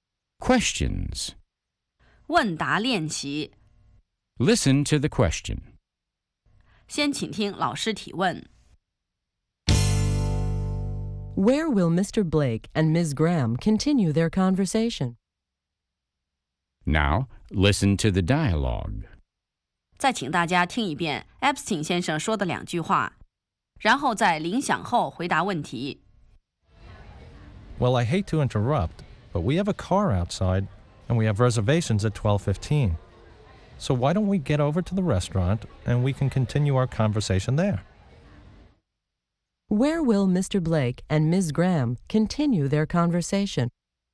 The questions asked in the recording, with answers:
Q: Where will Mr. Blake and Ms. Graham continue their conversation?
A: They'll continue their conversation at the restaurant.